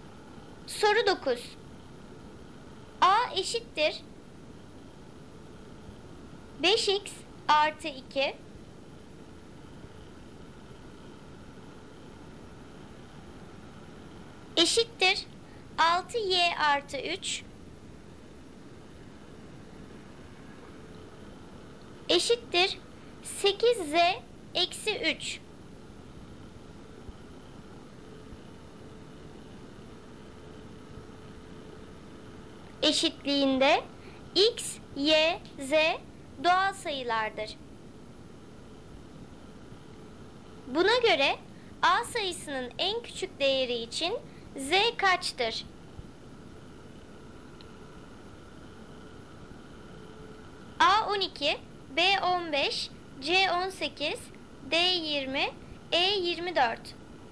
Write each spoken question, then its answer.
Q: Buna göre A sayısının en küçük değeri için z kaçtır?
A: Doğru cevap B 15.